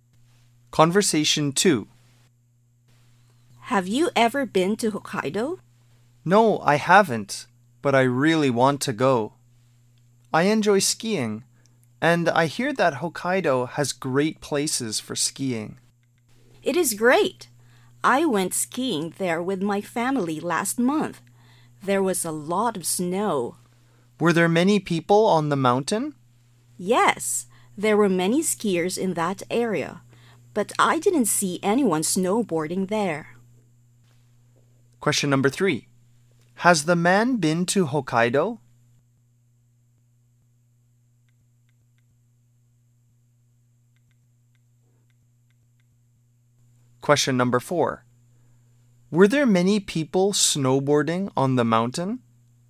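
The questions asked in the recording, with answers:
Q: Were there many people snowboarding on the mountain?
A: No, there weren't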